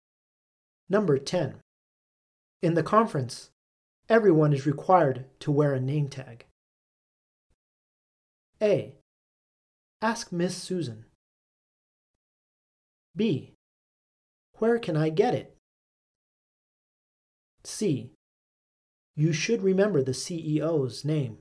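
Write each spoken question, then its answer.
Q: In the conference, everyone is required to wear a name tag.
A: B: Where can I get it?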